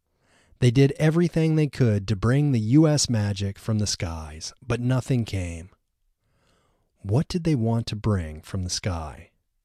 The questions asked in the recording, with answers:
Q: What did they want to bring from the sky?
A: They wanted to bring the US magic from the sky.